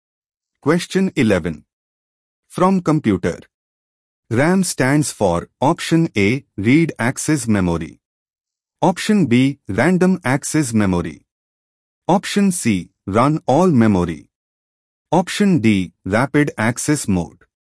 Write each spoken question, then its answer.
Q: RAM stands for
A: The correct answer is option B, random access memory.